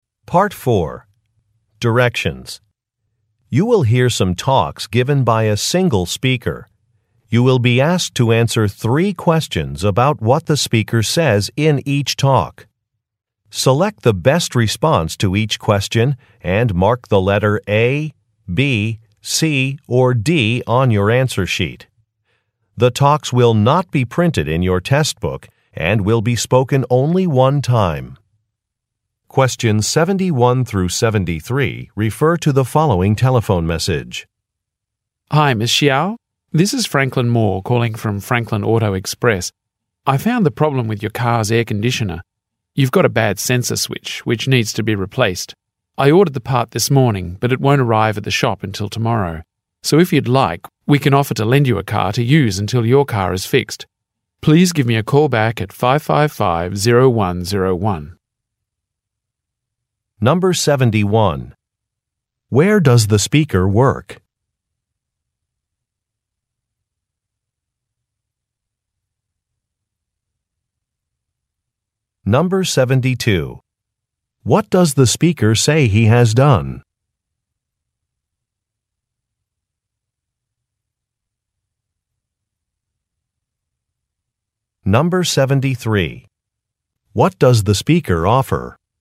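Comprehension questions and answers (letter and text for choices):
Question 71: Where does the speaker work?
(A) At an electronics store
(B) At a plumbing company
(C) At a car repair shop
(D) At a cleaning service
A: (C) At a car repair shop

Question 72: What does the speaker say he has done?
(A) Scheduled an appointment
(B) Completed a repair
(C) Adjusted an invoice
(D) Ordered a part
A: (D) Ordered a part

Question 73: What does the speaker offer?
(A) Use of a vehicle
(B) An extended warranty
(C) A free inspection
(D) Expedited delivery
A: (A) Use of a vehicle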